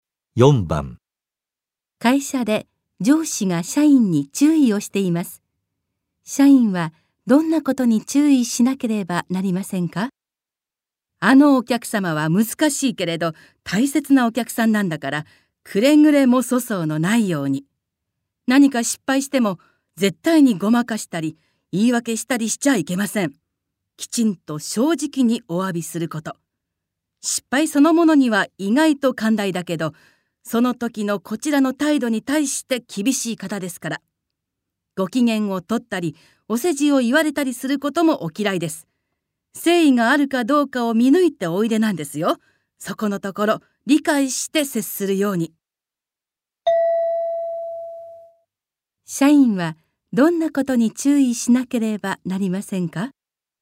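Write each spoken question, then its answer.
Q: 社員はどんなことに注意しなければなりませんか?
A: 失敗したらごまかさず正直に誠意をもって謝ること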